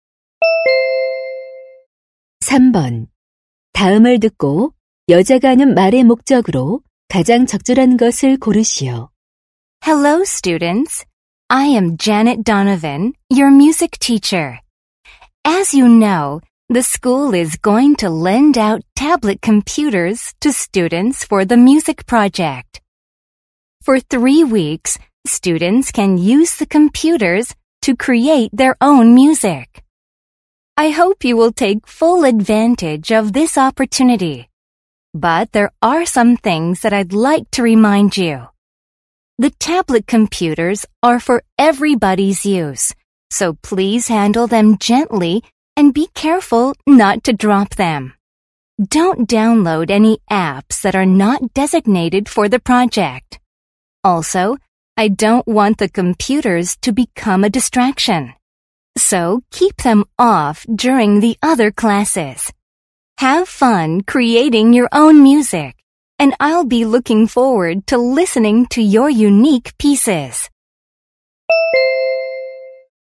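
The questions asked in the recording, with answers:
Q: 다음을 듣고 여자가 하는 말의 목적으로 가장 적절한 것을 고르시오.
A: 음악 프로젝트용 태블릿 컴퓨터 사용 시 주의 사항을 당부하려고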